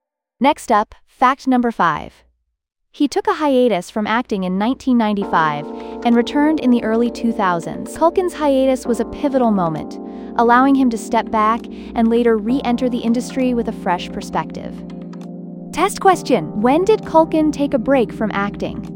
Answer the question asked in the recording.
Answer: 1995.